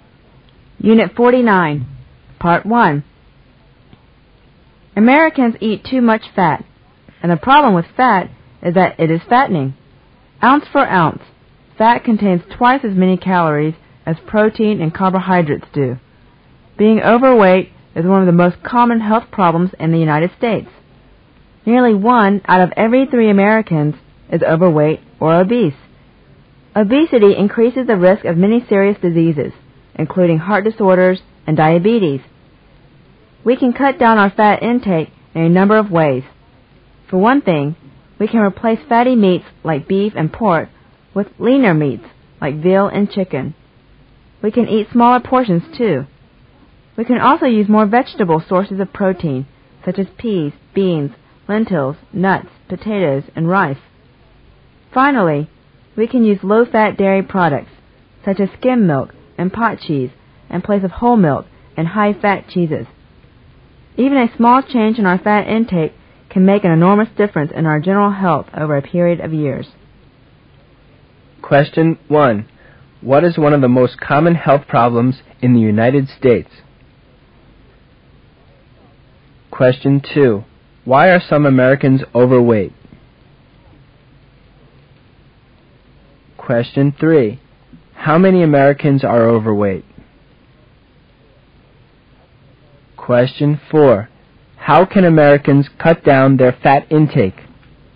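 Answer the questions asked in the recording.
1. Being overweight
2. They eat too much fat
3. Nearly one in three
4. Eat leaner meats, smaller portions, vegetable protein and low-fat dairy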